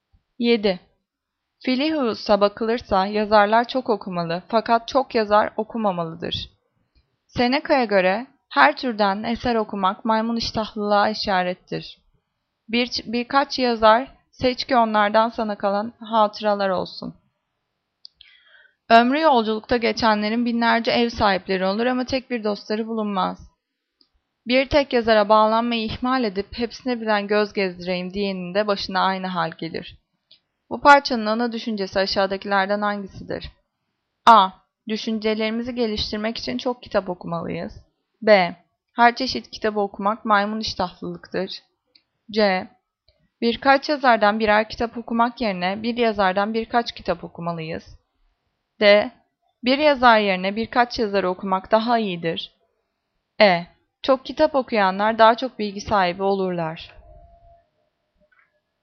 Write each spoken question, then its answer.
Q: Bu parçanın ana düşüncesi aşağıdakilerden hangisidir?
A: Cevap C. Birkaç yazardan birer kitap okumak yerine bir yazardan birkaç kitap okumalıyız.